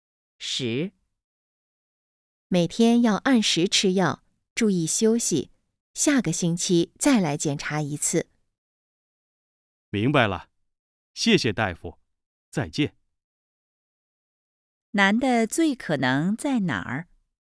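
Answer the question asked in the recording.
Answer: 医院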